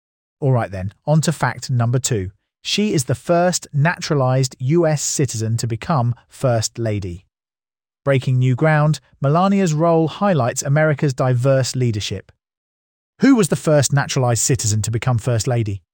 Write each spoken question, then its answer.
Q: Who was the first naturalized citizen to become First Lady?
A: Correct answer, Melania Trump.